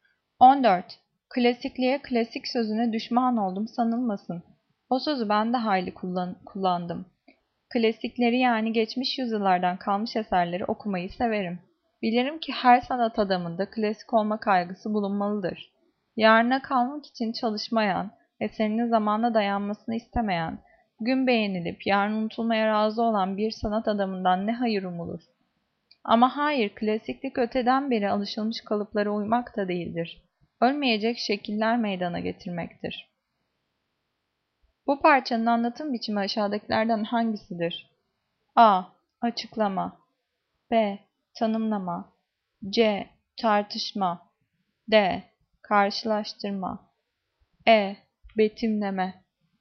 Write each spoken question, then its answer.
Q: Bu parçanın anlatım biçimi aşağıdakilerden hangisidir?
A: Cevap C. Tartışma.